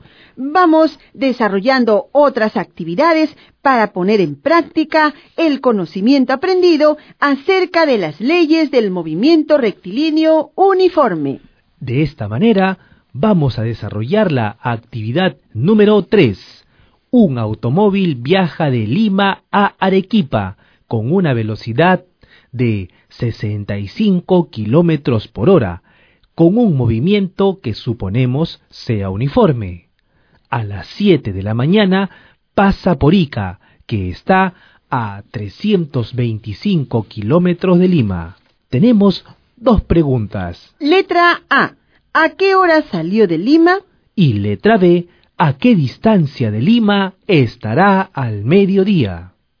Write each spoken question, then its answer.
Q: ¿A qué hora salió de Lima?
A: habiendo salido a las 2 de la mañana